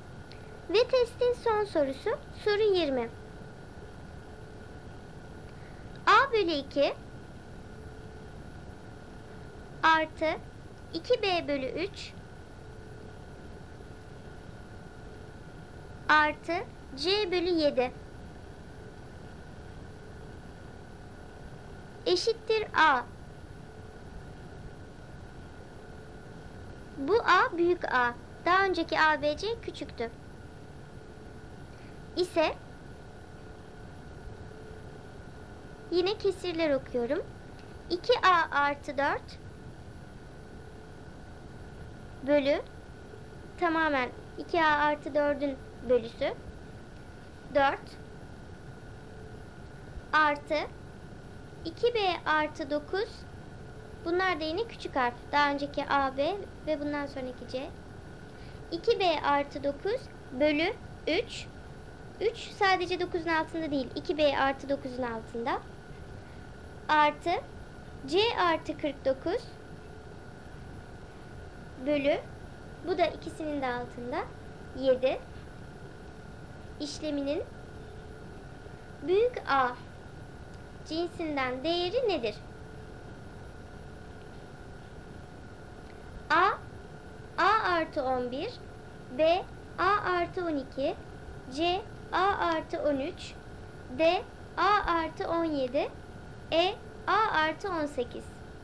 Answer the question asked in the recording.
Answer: Doğru cevap A artı 11.